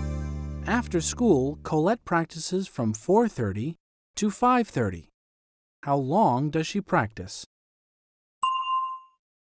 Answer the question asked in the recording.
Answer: For an hour. She practices for an hour.